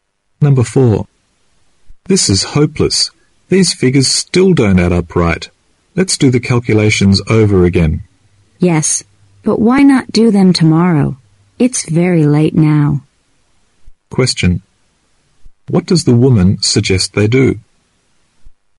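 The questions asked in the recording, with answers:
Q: What does the woman suggest they do?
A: Do the calculations again tomorrow.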